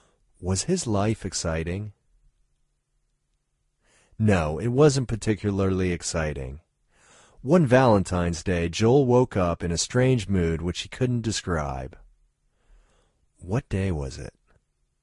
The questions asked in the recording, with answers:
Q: What day was it?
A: It was Valentine's Day.